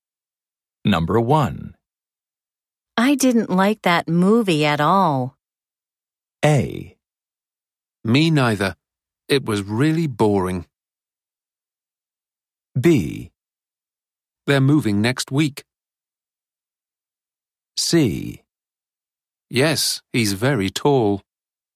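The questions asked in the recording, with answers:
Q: I didn't like that movie at all.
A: A: Me neither. It was really boring.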